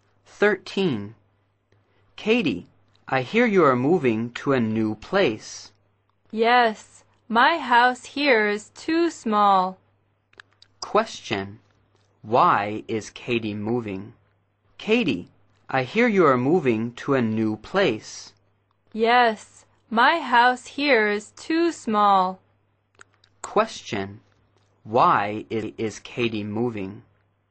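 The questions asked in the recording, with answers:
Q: Why is Katie moving?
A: Her house is too small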